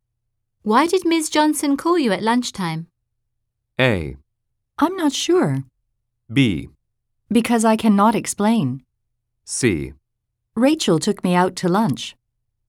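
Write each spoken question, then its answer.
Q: Why did Ms. Johnson call you at lunchtime?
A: A: I'm not sure.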